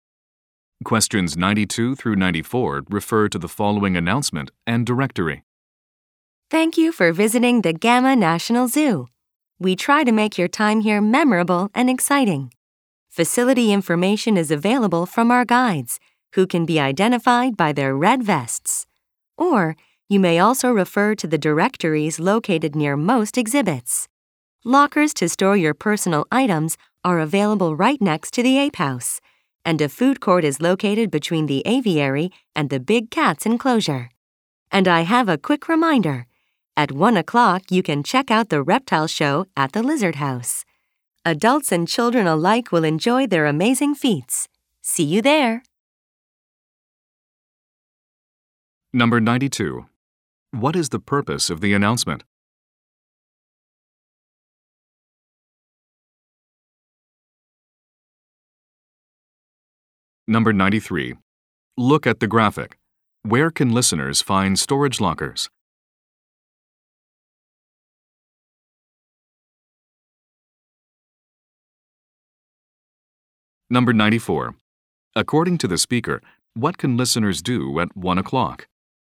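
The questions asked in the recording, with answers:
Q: What is the purpose of the announcement?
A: To give visitors information about the zoo's facilities

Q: According to the speaker, what can listeners do at 1 o'clock?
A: Watch the reptile show at the Lizard House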